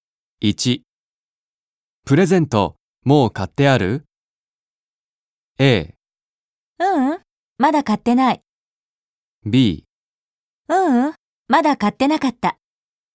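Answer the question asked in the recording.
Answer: A: ううん、まだ買ってない。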